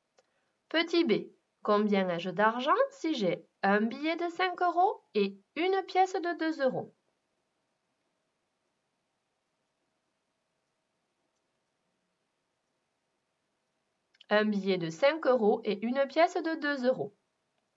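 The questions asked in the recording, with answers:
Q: combien ai-je d'argent si j'ai un billet de 5 euros et une pièce de 2 euros?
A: 7 euros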